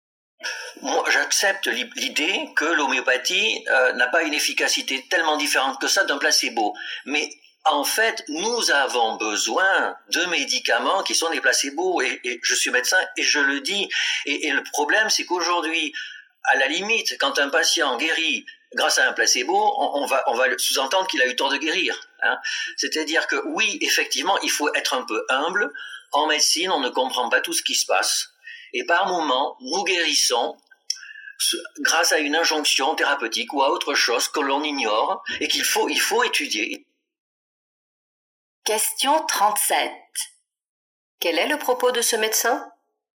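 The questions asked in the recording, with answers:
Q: Quel est le propos de ce médecin ?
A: Il défend l'utilité des placebos comme l'homéopathie : la médecine doit être humble, car on ne comprend pas toujours comment on guérit.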